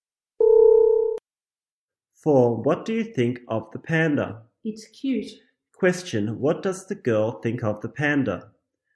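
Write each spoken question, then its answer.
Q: What does the girl think of the panda?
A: It's cute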